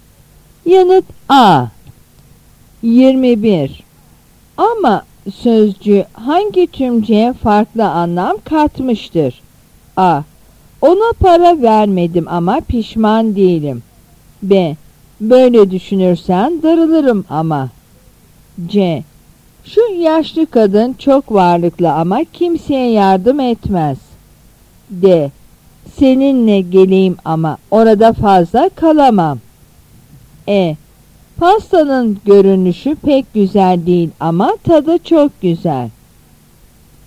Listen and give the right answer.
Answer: Yanıt B.